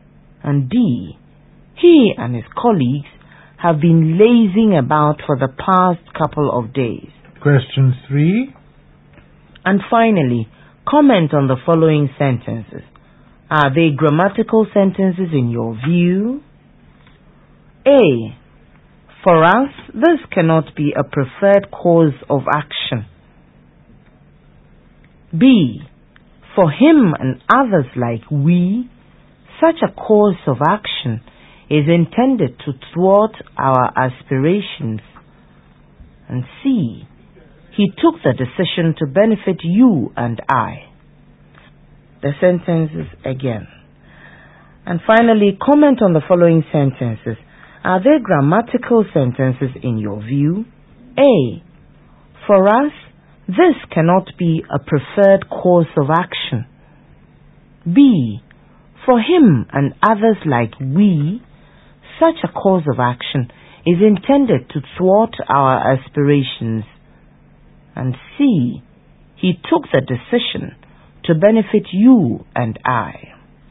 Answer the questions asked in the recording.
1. Correct.
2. Incorrect. It's better to say, for him and others like us.
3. Incorrect. It's better to say, he took the decision to benefit you and me.